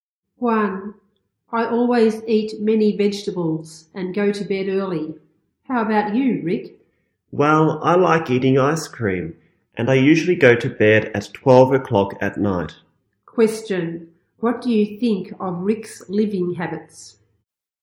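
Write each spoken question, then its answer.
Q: What do you think of Rick's living habits?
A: They are unhealthy.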